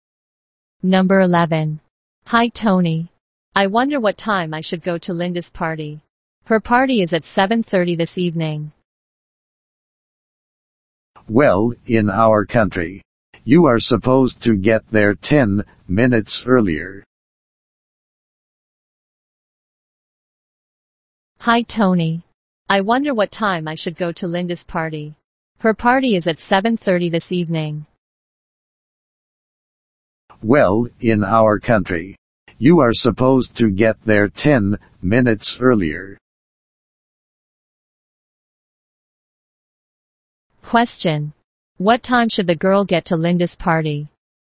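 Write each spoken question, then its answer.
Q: What time should the girl get to Linda's party?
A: 7:20 (10 minutes before 7:30)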